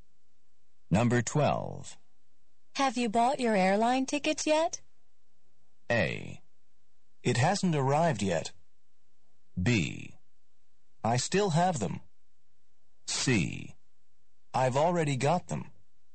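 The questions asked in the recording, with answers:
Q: Have you bought your airline tickets yet?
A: C: I've already got them.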